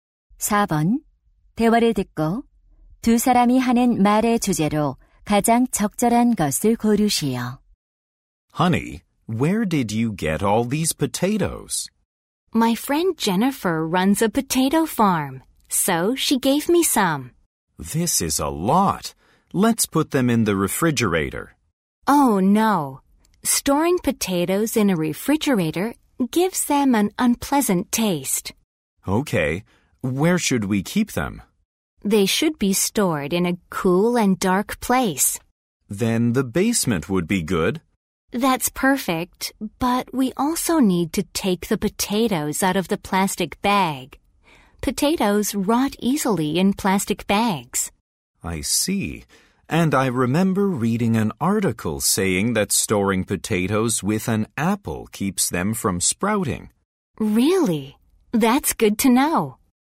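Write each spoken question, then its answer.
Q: 대화를 듣고 두 사람이 하는 말의 주제로 가장 적절한 것을 고르시오.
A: 감자를 보관하는 방법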